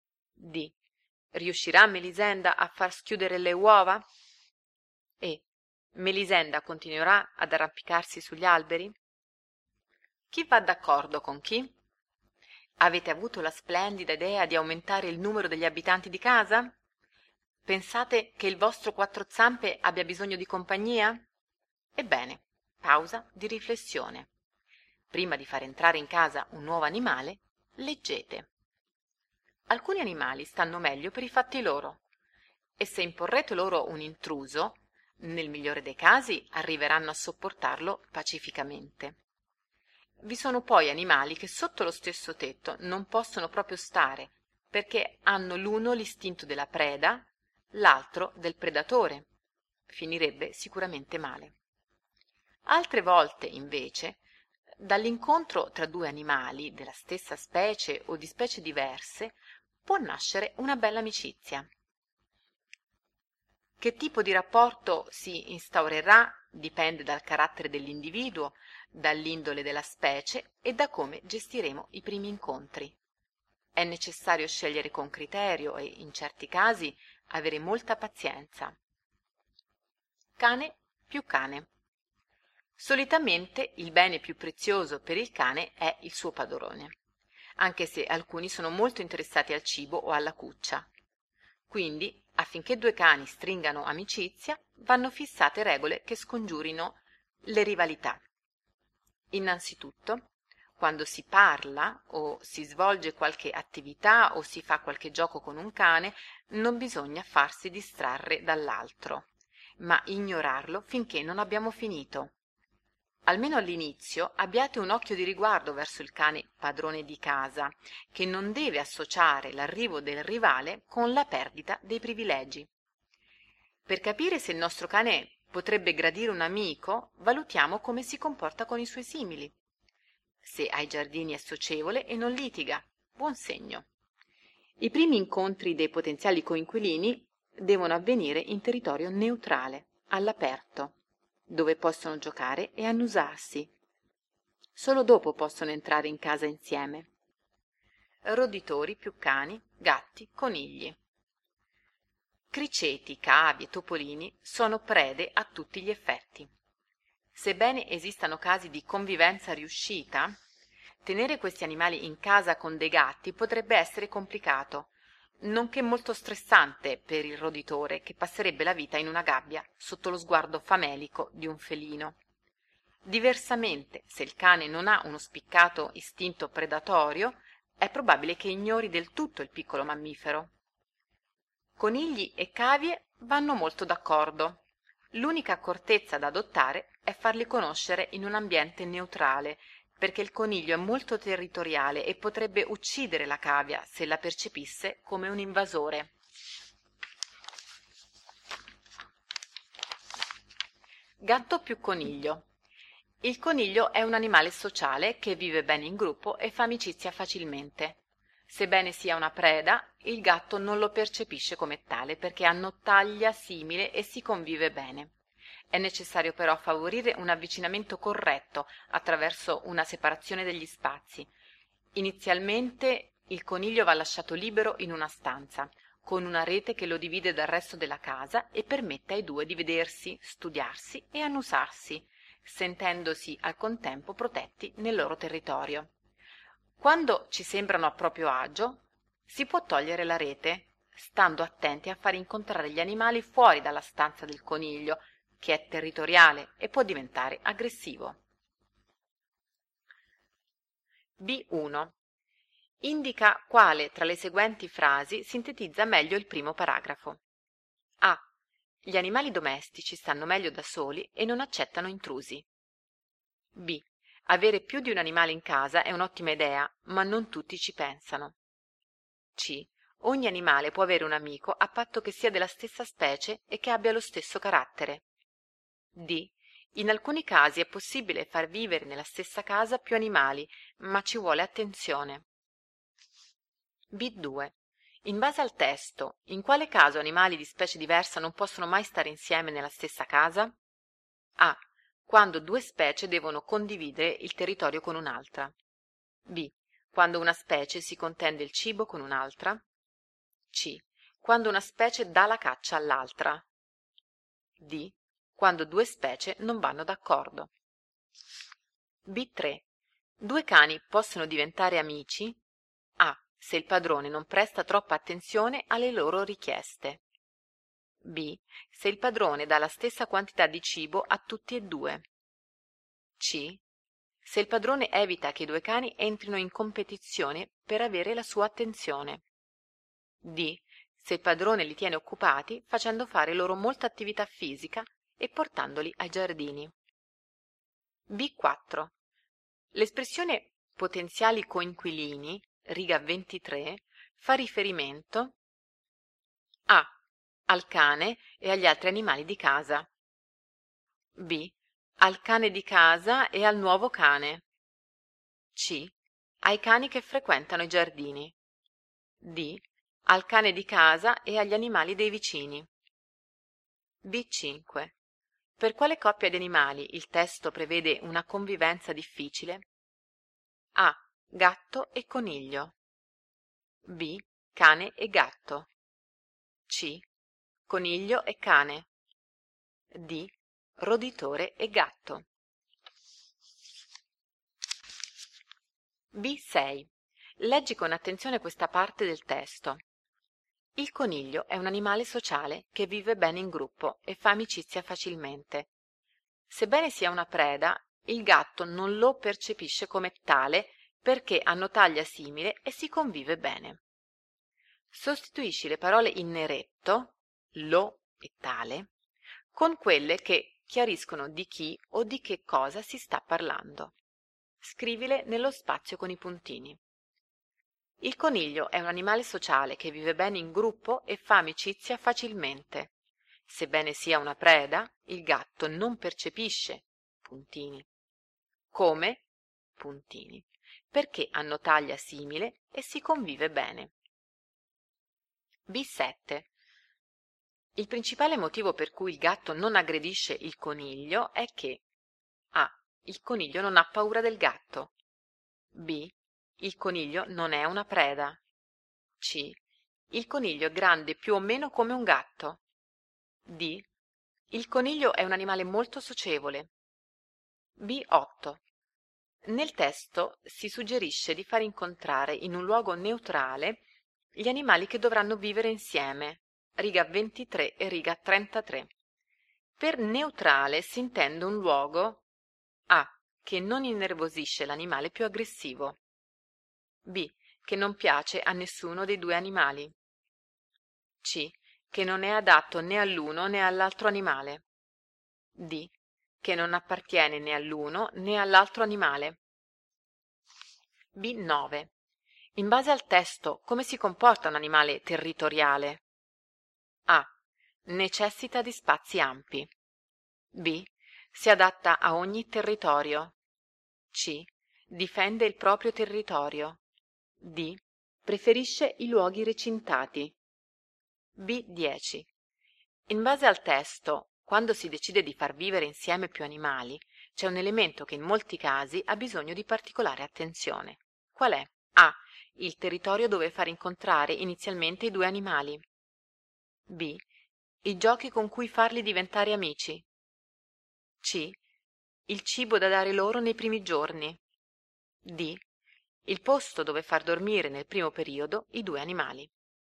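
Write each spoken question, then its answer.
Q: Indica quale tra le seguenti frasi sintetizza meglio il primo paragrafo.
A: D: In alcuni casi è possibile far vivere nella stessa casa più animali, ma ci vuole attenzione.

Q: In base al testo, in quale caso animali di specie diversa non possono mai stare insieme nella stessa casa?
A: C: Quando una specie dà la caccia all'altra.

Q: Due cani possono diventare amici?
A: C: Se il padrone evita che i due cani entrino in competizione per avere la sua attenzione.

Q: L'espressione potenziali coinquilini, riga 23, fa riferimento A.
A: B: al cane di casa e al nuovo cane.

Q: Per quale coppia di animali il testo prevede una convivenza difficile?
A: D: roditore e gatto.

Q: Il principale motivo per cui il gatto non aggredisce il coniglio è che A.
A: C: il coniglio è grande più o meno come un gatto.

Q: Per neutrale si intende un luogo A.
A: D: che non appartiene né all'uno né all'altro animale.

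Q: In base al testo, come si comporta un animale territoriale?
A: C: Difende il proprio territorio.

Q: Qual è?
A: A: il territorio dove far incontrare inizialmente i due animali.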